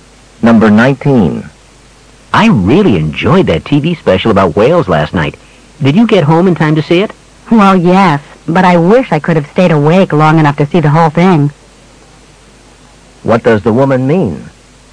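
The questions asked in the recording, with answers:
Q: What does the woman mean?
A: She fell asleep before the program ended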